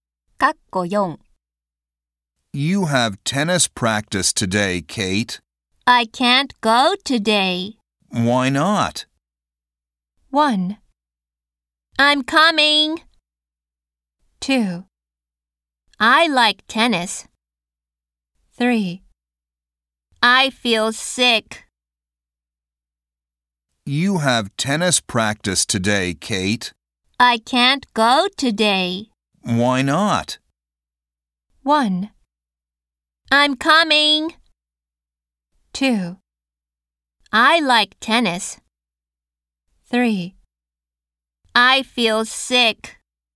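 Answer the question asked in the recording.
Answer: 3: I feel sick.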